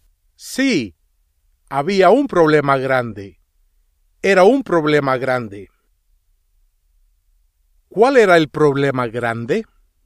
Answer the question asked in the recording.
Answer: Ana no quería ir a la escuela.